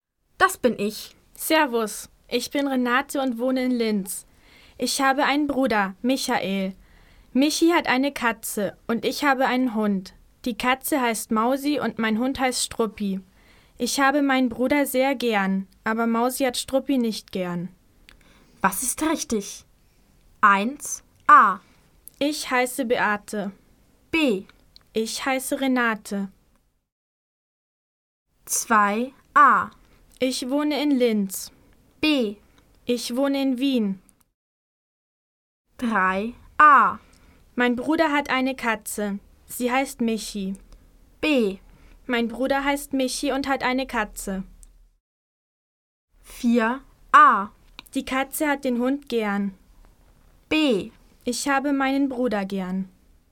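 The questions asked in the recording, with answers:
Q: Was ist richtig? 1. A. Ich heiße Beate. B. Ich heiße Renate.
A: B: Ich heiße Renate.

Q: 2. A. Ich wohne in Linz. B. Ich wohne in Wien.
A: A: Ich wohne in Linz.

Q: 3. A. Mein Bruder hat eine Katze. Sie heißt Michi. B. Mein Bruder heißt Michi und hat eine Katze.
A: B: Mein Bruder heißt Michi und hat eine Katze.

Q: 4. A. Die Katze hat den Hund gern. B. Ich habe meinen Bruder gern.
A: B: Ich habe meinen Bruder gern.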